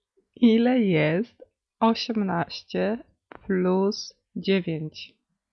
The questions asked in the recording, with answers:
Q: Ile jest 18 plus 9?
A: 27.